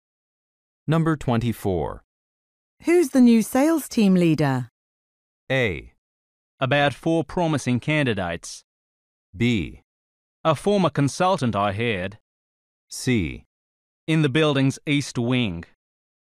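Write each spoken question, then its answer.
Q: Who's the new sales team leader?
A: B: A former consultant I hired.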